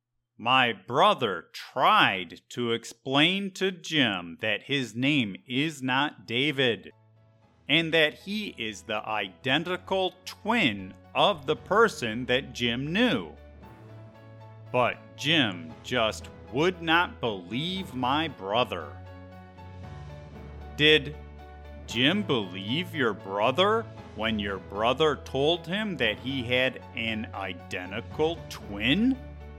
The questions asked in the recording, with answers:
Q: Did Jim believe your brother when your brother told him that he had an identical twin?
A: No, Jim did not believe my brother.